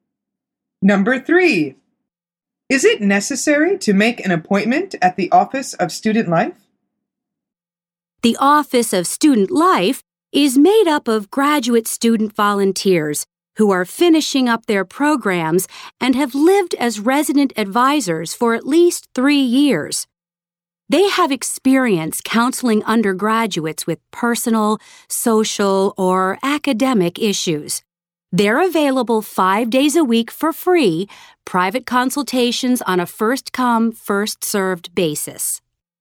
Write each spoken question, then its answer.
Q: Is it necessary to make an appointment at the Office of Student Life?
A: The answer is no.